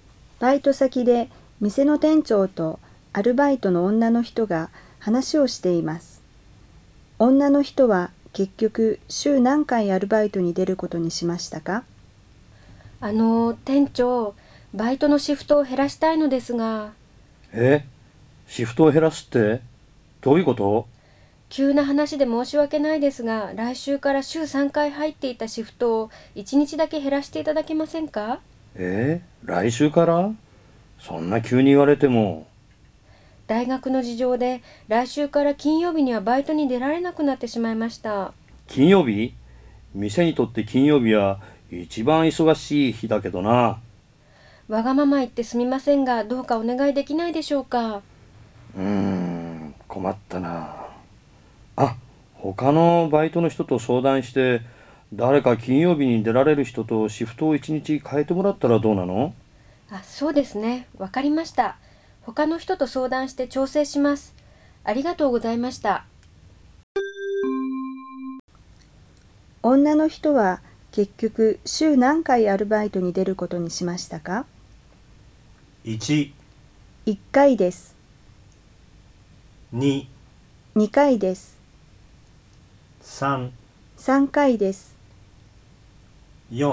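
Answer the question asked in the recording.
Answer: 3回です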